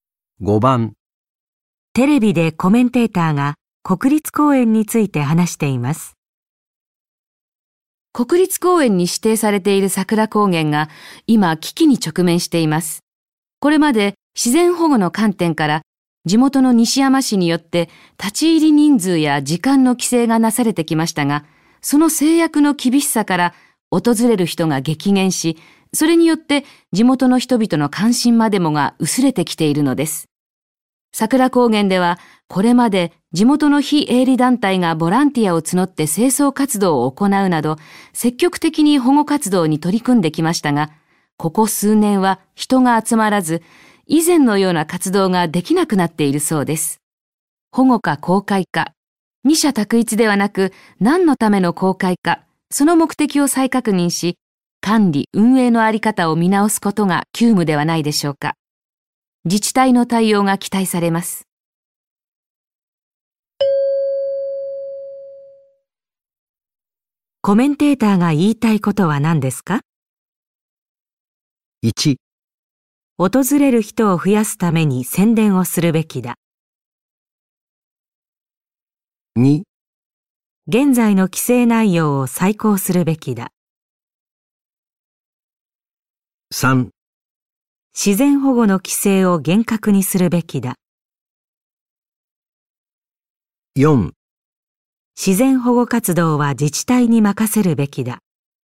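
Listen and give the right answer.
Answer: 2: 現在の規制内容を再考するべきだ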